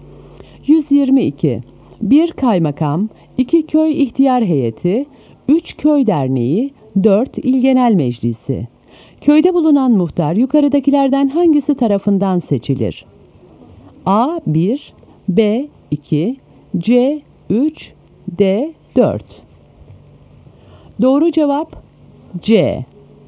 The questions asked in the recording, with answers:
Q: Köyde bulunan muhtar yukarıdakilerden hangisi tarafından seçilir?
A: Doğru cevap C.